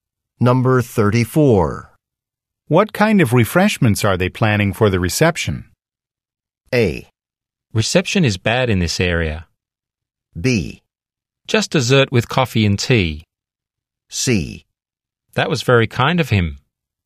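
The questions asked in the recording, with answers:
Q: What kind of refreshments are they planning for the reception?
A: B: Just dessert with coffee and tea.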